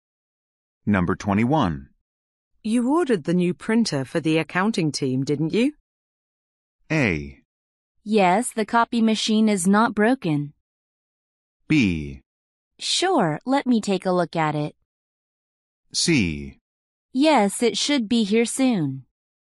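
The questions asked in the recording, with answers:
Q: You ordered the new printer for the accounting team, didn't you?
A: C: Yes, it should be here soon.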